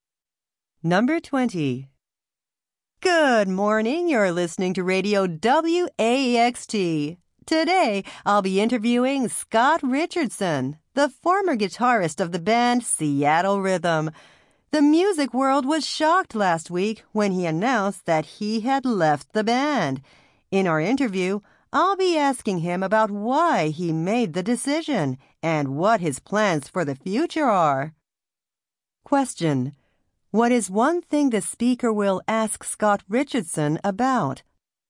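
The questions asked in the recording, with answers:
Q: What is one thing the speaker will ask Scott Richardson about?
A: Why he left the band.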